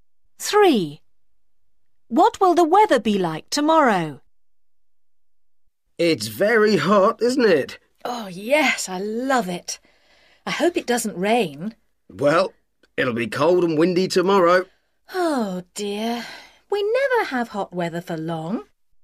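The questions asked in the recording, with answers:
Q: What will the weather be like tomorrow?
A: Cold and windy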